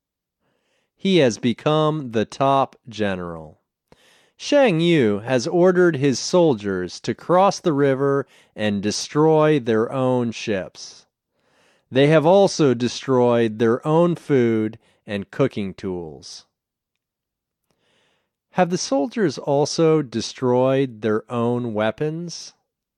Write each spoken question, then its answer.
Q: Have the soldiers also destroyed their own weapons?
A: No, they haven't also destroyed their weapons.